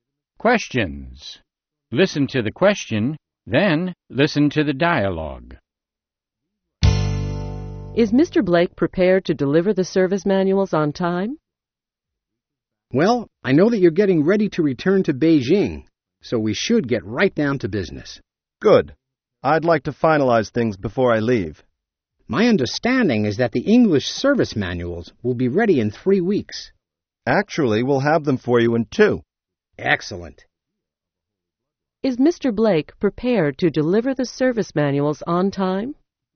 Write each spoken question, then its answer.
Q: Is Mr. Blake prepared to deliver the service manuals on time?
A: Yes, he is. The manuals will be ready in 2 weeks.